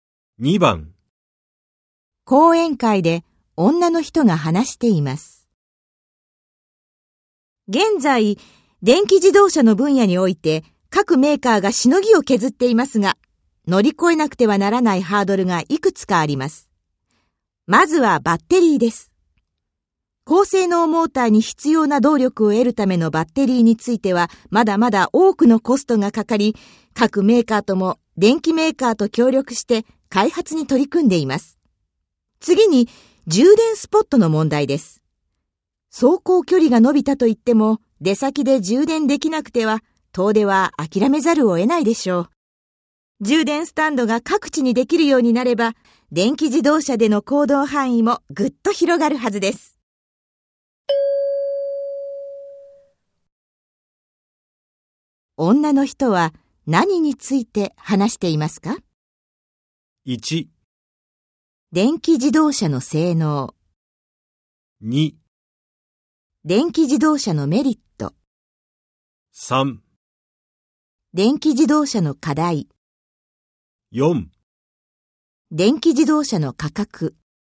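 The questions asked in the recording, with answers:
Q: 女の人は何について話していますか?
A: 3: 電気自動車の課題。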